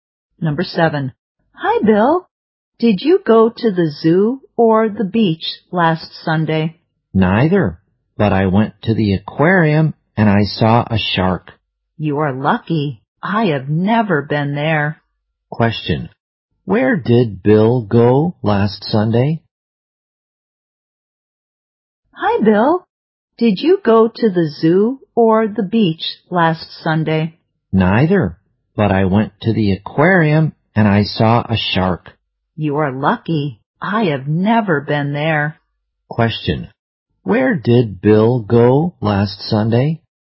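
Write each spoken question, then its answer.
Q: Where did Bill go last Sunday?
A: The aquarium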